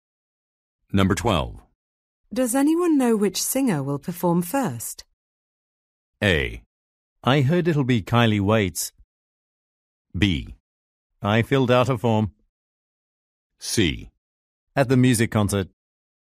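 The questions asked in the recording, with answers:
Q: Does anyone know which singer will perform first?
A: A: I heard it'll be Kylie Waits.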